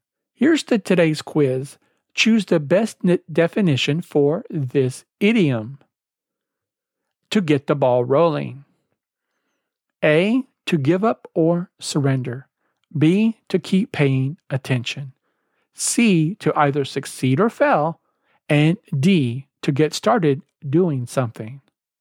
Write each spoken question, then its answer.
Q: Choose the best definition for this idiom. To get the ball rolling.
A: The answer is D, to get started doing something.